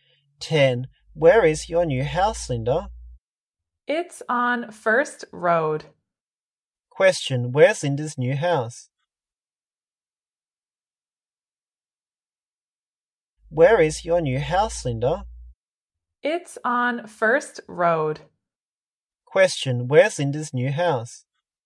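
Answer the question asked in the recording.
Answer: On First Road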